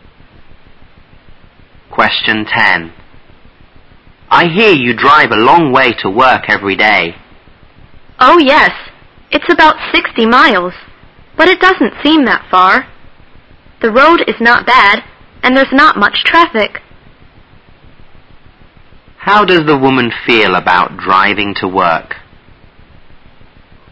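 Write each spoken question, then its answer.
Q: How does the woman feel about driving to work?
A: She doesn't mind it; it doesn't seem far to her.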